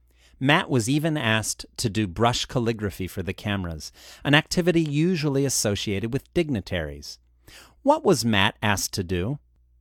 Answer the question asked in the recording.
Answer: He was asked to do brush calligraphy for the cameras.